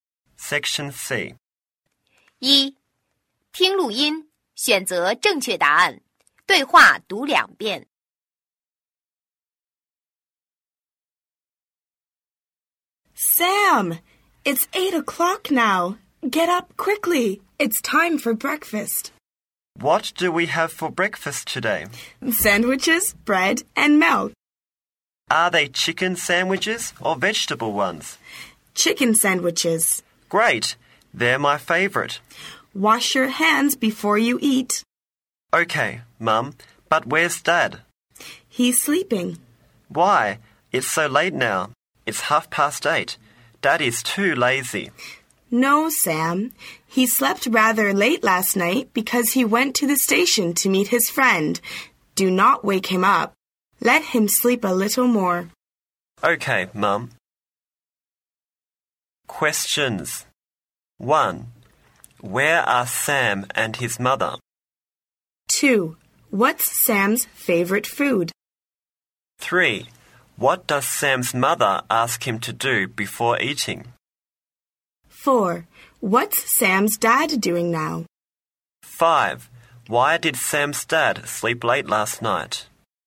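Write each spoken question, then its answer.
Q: What's Sam's favorite food?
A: Chicken sandwiches

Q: What does Sam's mother ask him to do before eating?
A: Wash his hands

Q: What's Sam's dad doing now?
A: He's sleeping

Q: Why did Sam's dad sleep late last night?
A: He went to the station to meet his friend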